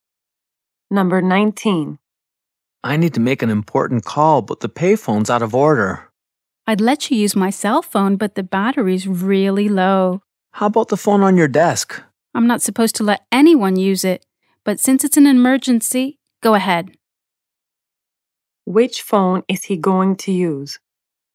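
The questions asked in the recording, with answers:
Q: Which phone is he going to use?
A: The phone on the desk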